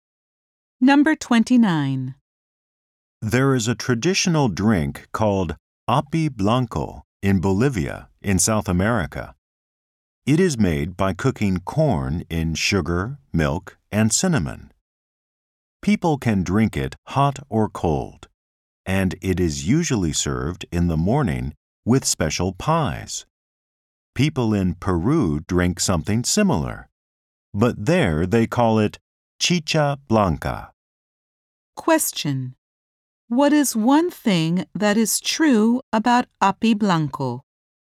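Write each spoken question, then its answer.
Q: What is one thing that is true about api blanco?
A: It is made by cooking corn in sugar, milk, and cinnamon.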